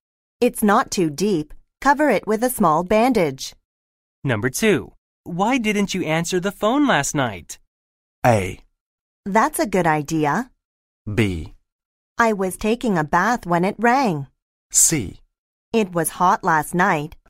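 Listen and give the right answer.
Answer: B: I was taking a bath when it rang.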